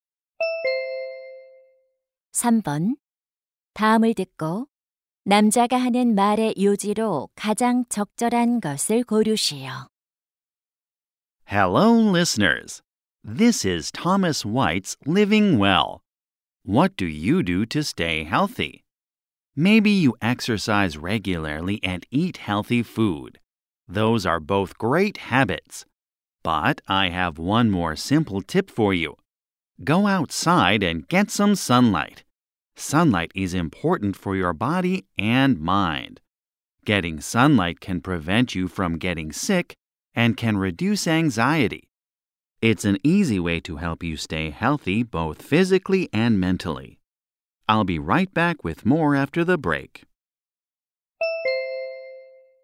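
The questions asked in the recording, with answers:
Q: 다음을 듣고 남자가 하는 말의 요지로 가장 적절한 것을 고르시오.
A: 햇빛을 쬐는 것은 몸과 마음의 건강에 중요하다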